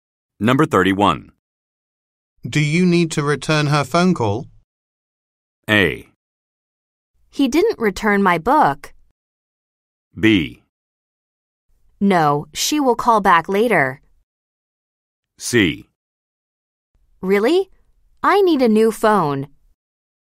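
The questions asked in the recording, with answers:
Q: Do you need to return her phone call?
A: B: No, she will call back later.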